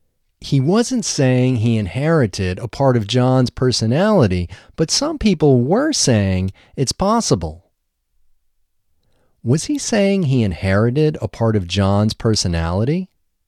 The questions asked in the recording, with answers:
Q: Was he saying he inherited a part of John's personality?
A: No, he wasn't saying he inherited a part of John's personality.